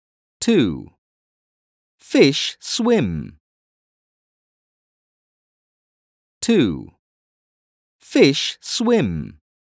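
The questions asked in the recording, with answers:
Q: Fish swim.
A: yes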